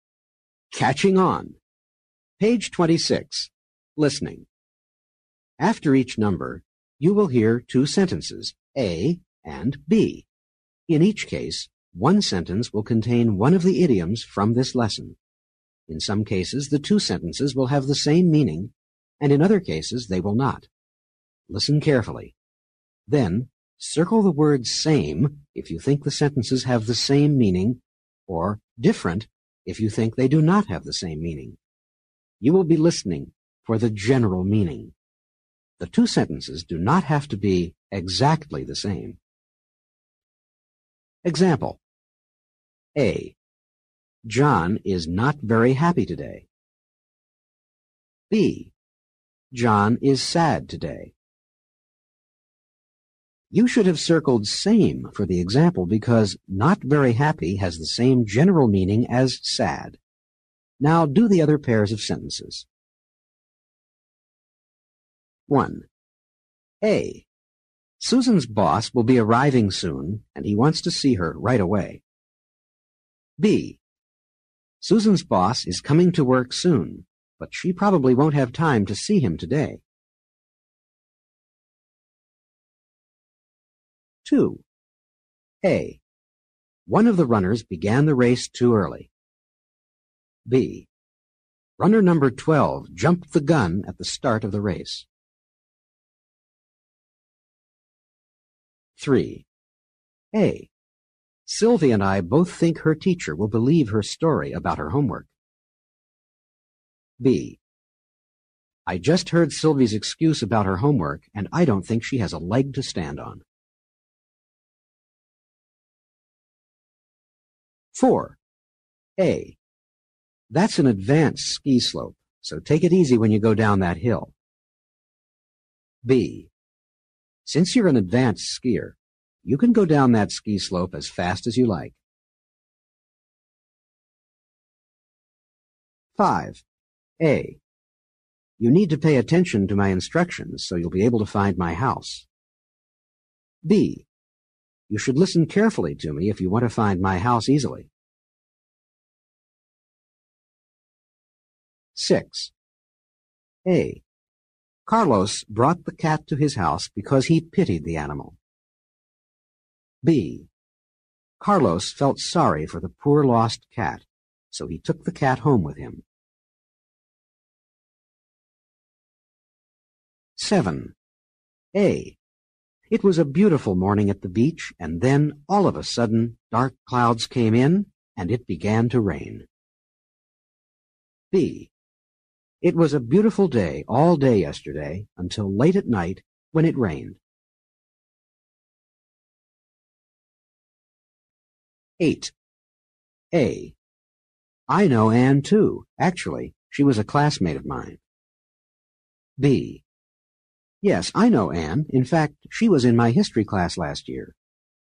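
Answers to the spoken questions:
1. different
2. same
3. different
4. different
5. same
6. same
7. different
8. same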